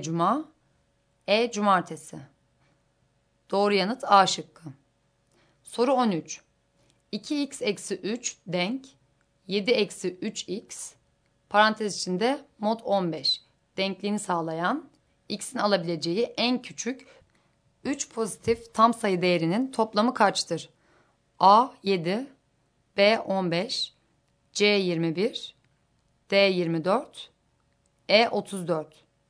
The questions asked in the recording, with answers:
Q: 2x eksi 3 denk 7 eksi 3x parantez içinde mod 15 denkliğini sağlayan x'in alabileceği en küçük 3 pozitif tam sayı değerinin toplamı kaçtır?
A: Doğru yanıt B şıkkı.